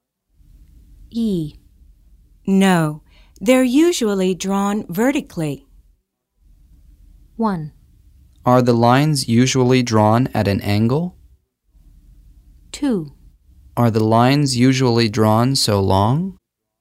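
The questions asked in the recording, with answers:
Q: No, they're usually drawn vertically.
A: 1: Are the lines usually drawn at an angle?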